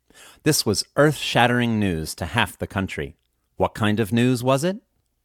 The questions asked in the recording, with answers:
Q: What kind of news was it?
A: It was earth-shattering news.